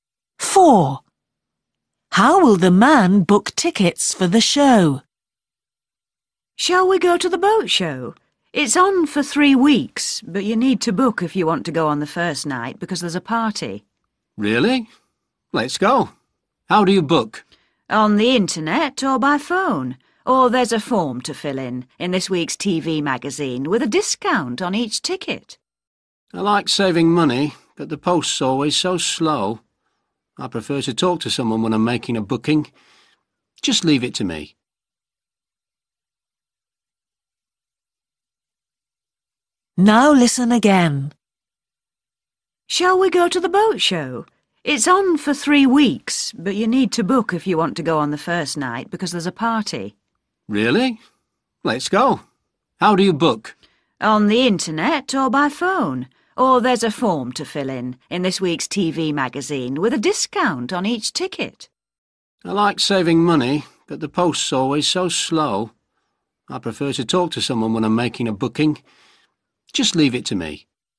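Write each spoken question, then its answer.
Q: How will the man book tickets for the show?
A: by phone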